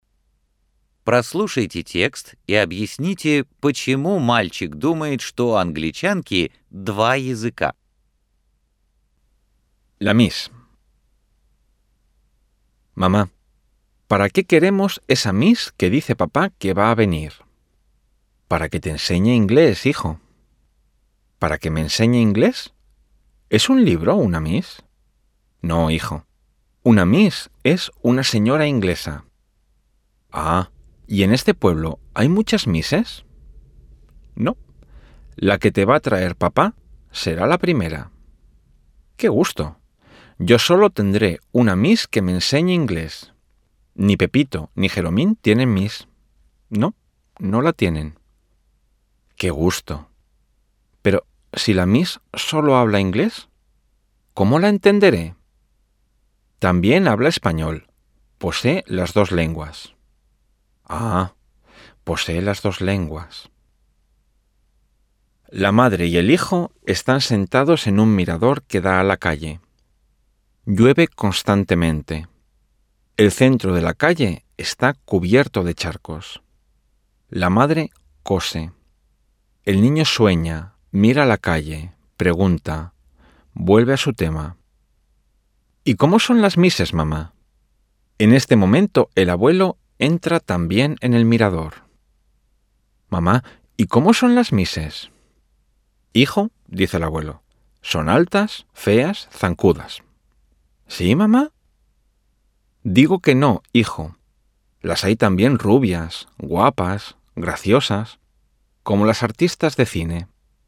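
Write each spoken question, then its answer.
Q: Прослушайте текст и объясните, почему мальчик думает, что у англичанки два языка.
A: Мама сказала, что мисс «posee las dos lenguas» (владеет двумя языками — английским и испанским), а мальчик понял это буквально: будто у неё два языка во рту.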